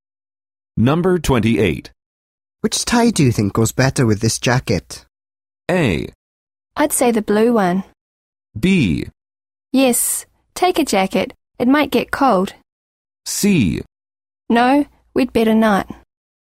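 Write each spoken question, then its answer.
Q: Which tie do you think goes better with this jacket?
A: A: I'd say the blue one.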